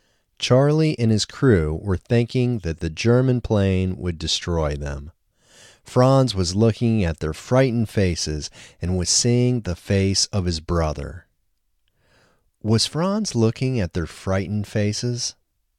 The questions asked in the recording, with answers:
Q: Was Franz looking at their frightened faces?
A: Yes, Franz was looking at their frightened faces.